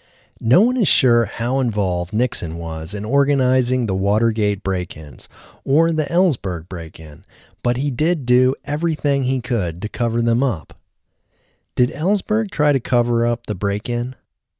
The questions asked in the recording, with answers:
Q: Did Ellsberg try to cover up the break-in?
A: No, Ellsberg didn't try to cover up the break-in.